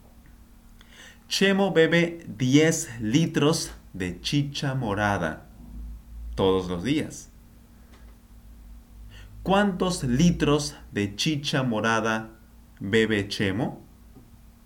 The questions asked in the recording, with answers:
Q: ¿Cuántos litros de chicha morada bebe Chemo?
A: 10 litros, por supuesto. 10 litros.